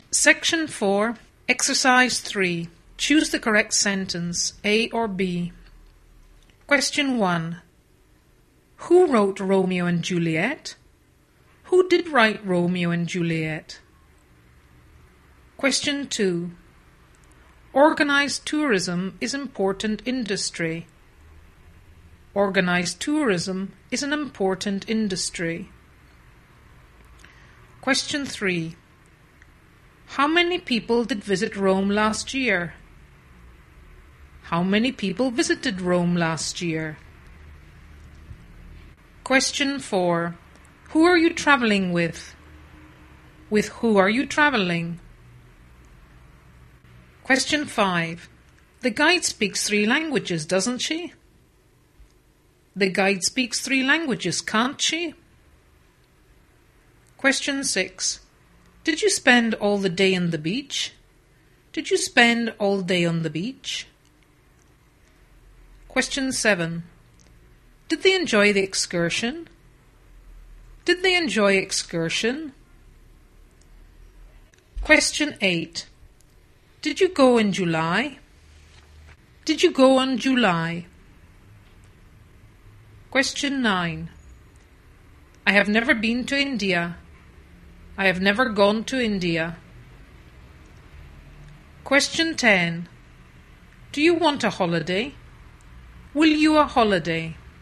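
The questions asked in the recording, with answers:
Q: Who wrote Romeo and Juliet? Who did write Romeo and Juliet?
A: A: Who wrote Romeo and Juliet?

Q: How many people did visit Rome last year? How many people visited Rome last year?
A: B: How many people visited Rome last year?

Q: Who are you traveling with? With who are you traveling?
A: A: Who are you traveling with?

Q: The guide speaks three languages, doesn't she? The guide speaks three languages, can't she?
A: A: The guide speaks three languages, doesn't she?

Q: Did you spend all the day on the beach? Did you spend all day on the beach?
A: B: Did you spend all day on the beach?

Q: Did they enjoy the excursion? Did they enjoy excursion?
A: A: Did they enjoy the excursion?

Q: Did you go in July? Did you go on July?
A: A: Did you go in July?

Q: Do you want a holiday? Will you a holiday?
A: A: Do you want a holiday?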